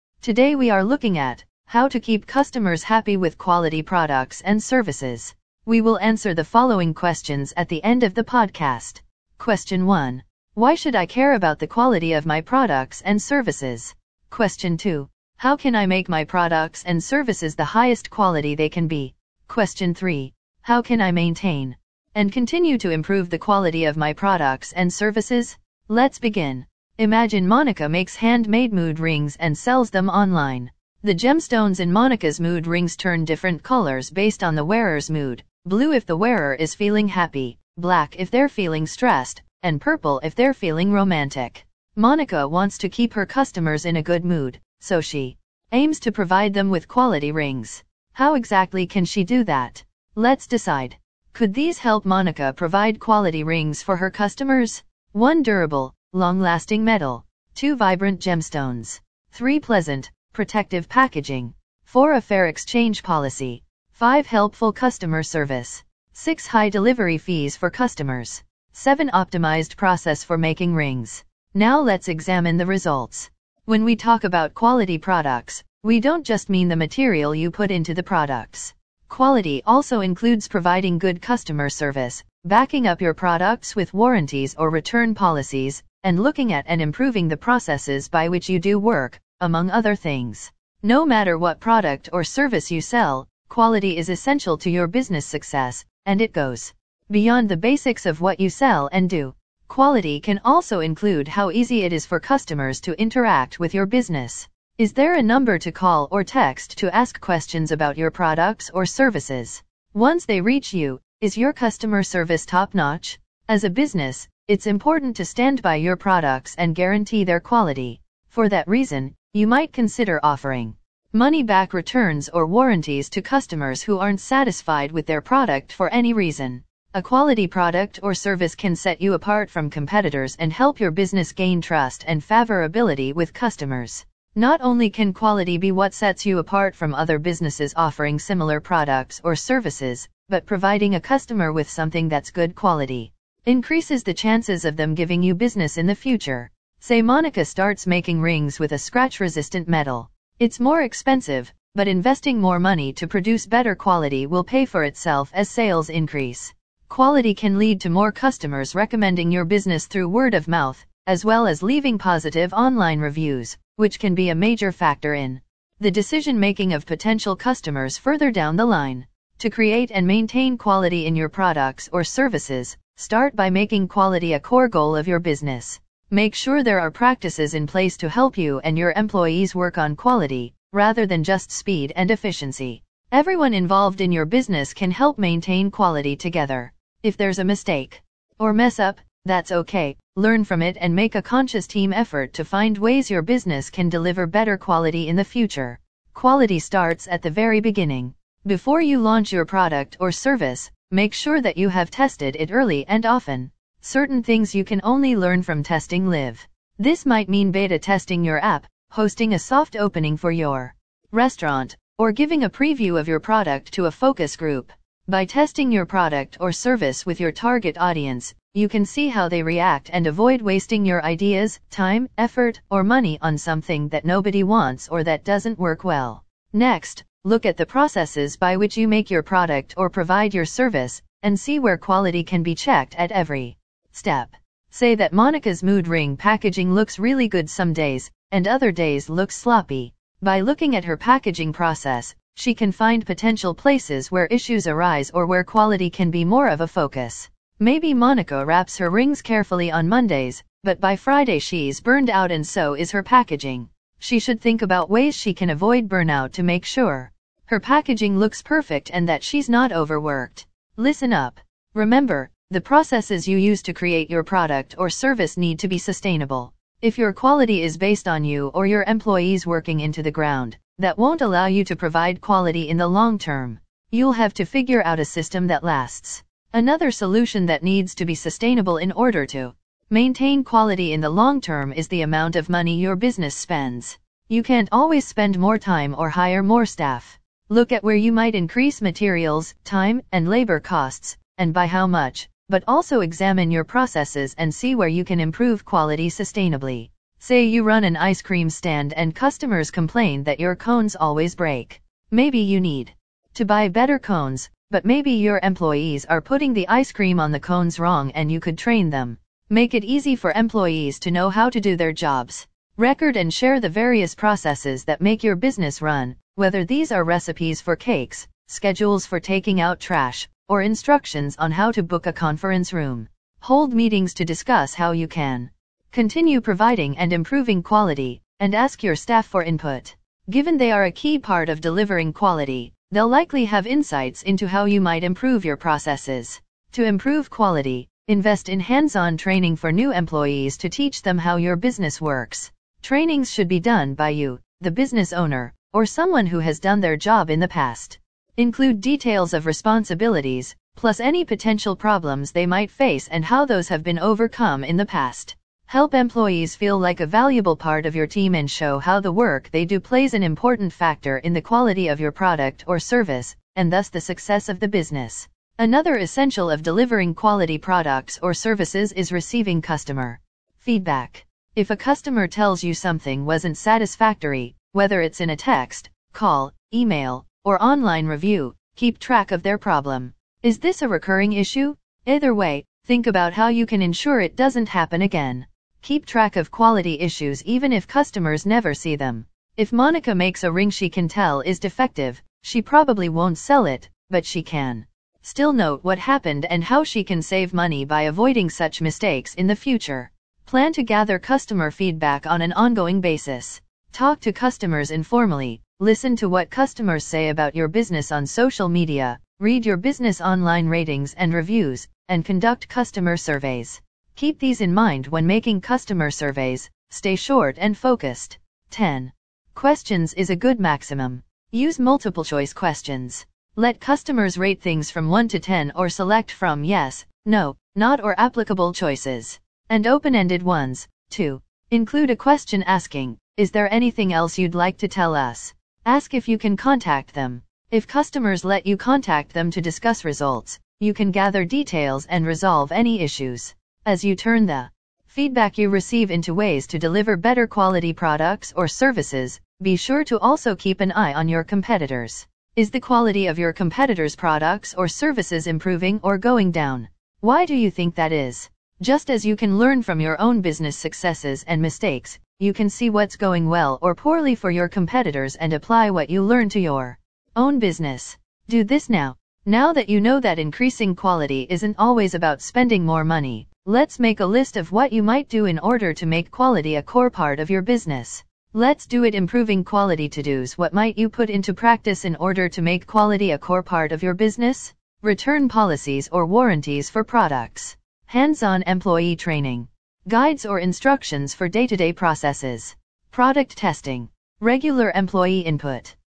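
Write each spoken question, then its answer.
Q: Why should I care about the quality of my products and services?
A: It sets you apart from competitors, builds customer trust and makes repeat business and good recommendations and reviews more likely.

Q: How can I make my products and services the highest quality they can be?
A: Make quality a core goal, test your product or service early and often, and check quality at every step of your processes.

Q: How can I maintain and continue to improve the quality of my products and services?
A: Use sustainable processes, record and share them, train employees and ask for their input, collect customer feedback and keep track of problems, and watch competitors.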